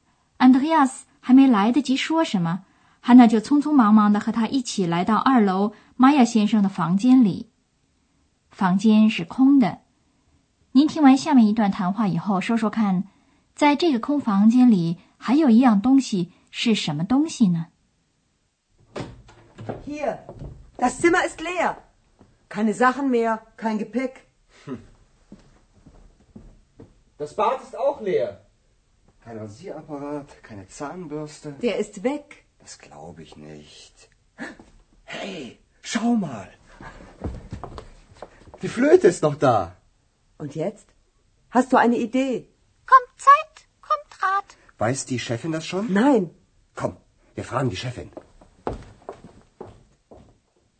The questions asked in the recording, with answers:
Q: 在这个空房间里还有一样东西是什么东西呢?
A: 在这个空空荡的房间里留下的唯一的东西就是玛雅先生的笛子。